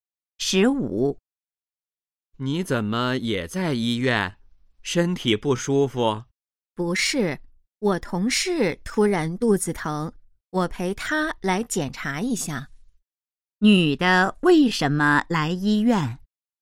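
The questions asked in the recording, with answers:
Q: 女的为什么来医院?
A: 陪同事来检查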